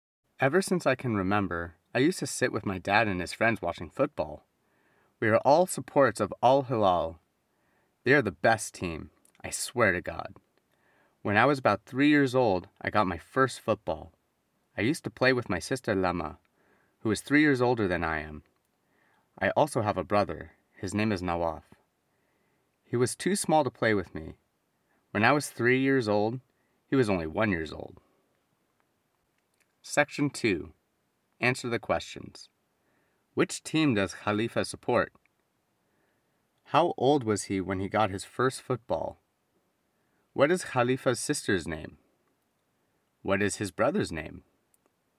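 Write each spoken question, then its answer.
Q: Which team does Khalifa support?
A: Al Hilal

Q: How old was he when he got his first football?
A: About 3 years old

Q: What is Khalifa's sister's name?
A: Lama

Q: What is his brother's name?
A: Nawaf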